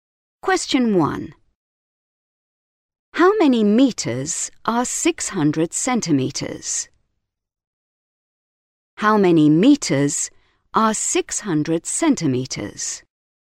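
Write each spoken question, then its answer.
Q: How many meters are 600 centimeters?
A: 6 metres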